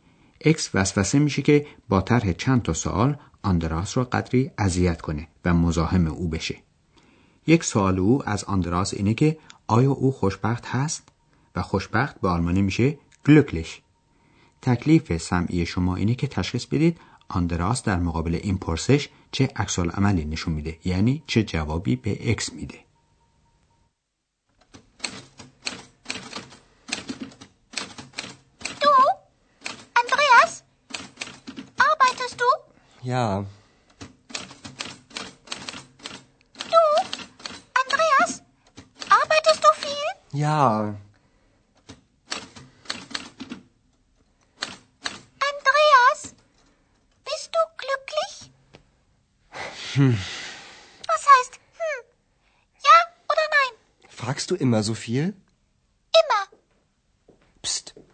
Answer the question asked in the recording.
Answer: پس آندراس جواب سریحی به سوال اکس نمیده و فقط زیر لبی چیزی میگه که مفهوم نمیشه